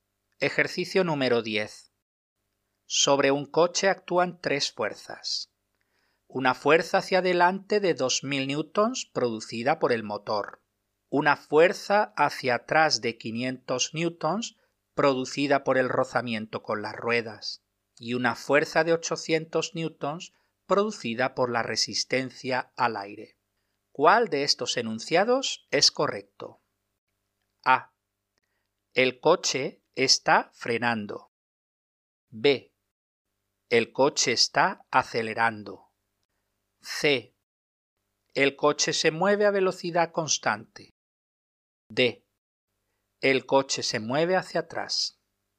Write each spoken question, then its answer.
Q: ¿Cuál de estos enunciados es correcto?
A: La respuesta correcta es la B.